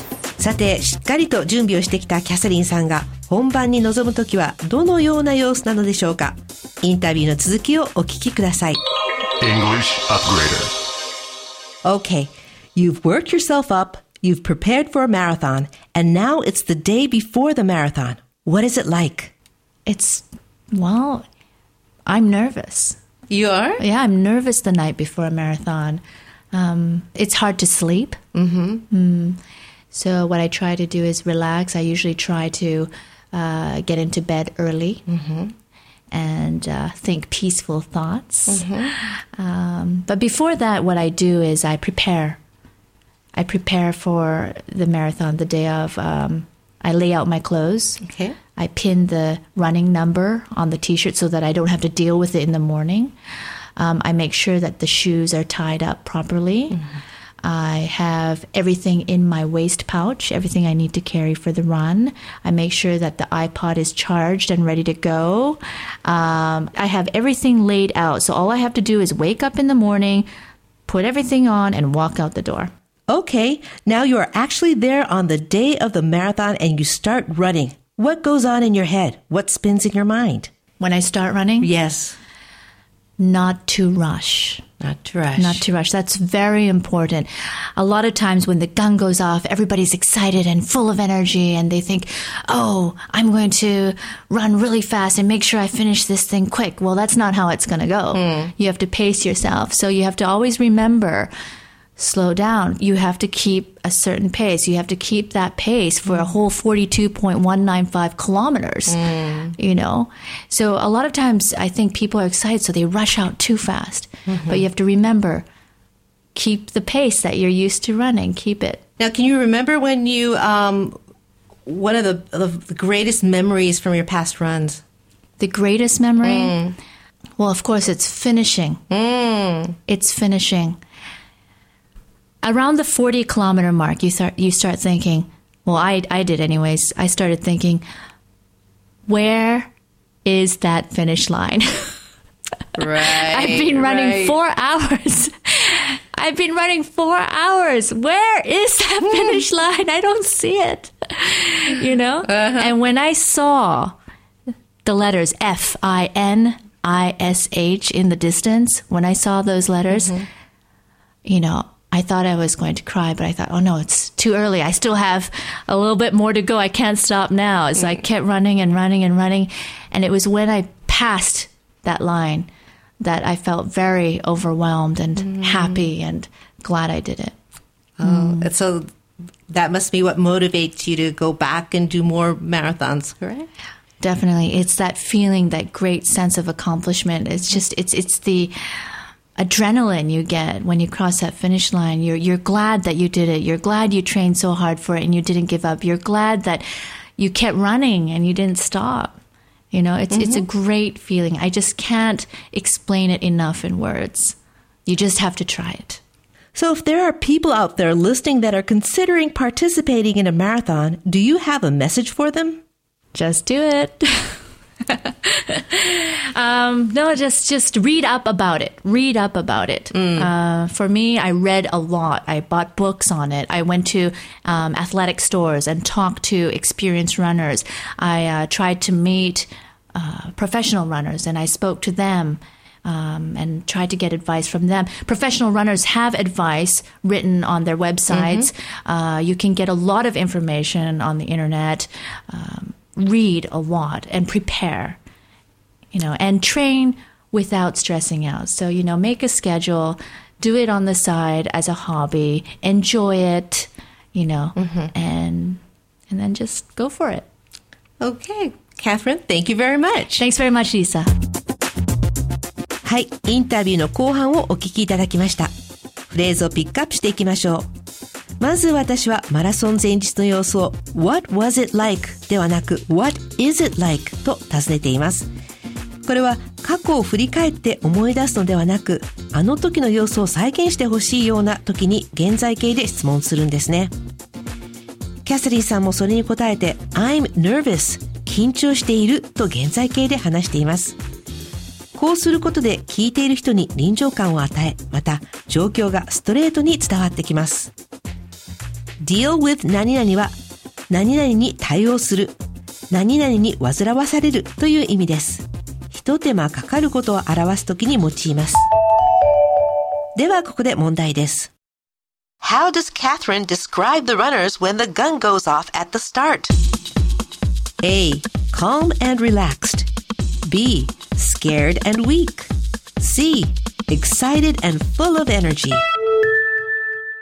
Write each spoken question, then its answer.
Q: How does Catherine describe the runners when the gun goes off at the start?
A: 正解は C。興奮しているし、エネルギーもあるです。